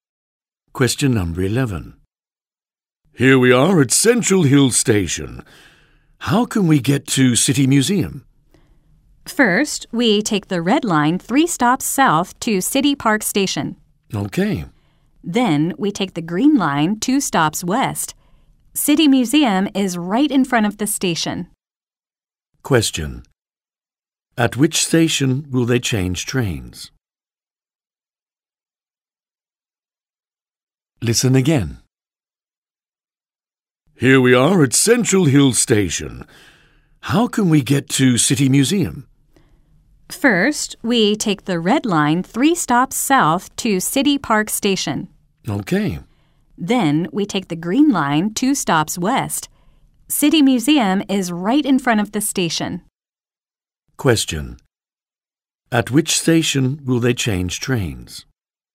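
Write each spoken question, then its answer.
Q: Question. At which station will they change trains?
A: City Park Station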